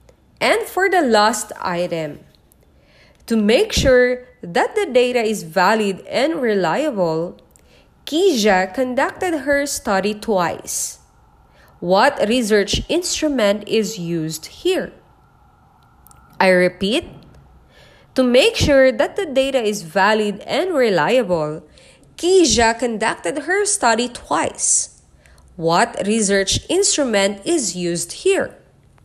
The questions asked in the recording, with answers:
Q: What research instrument is used here?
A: The correct answer for this item is letter C, experiment.